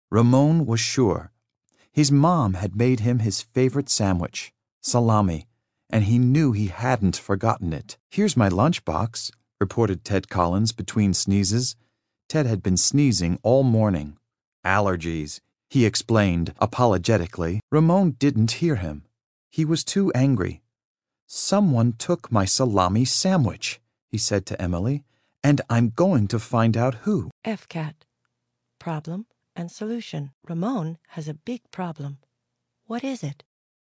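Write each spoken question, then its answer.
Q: Ramon has a big problem. What is it?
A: Someone took his salami sandwich.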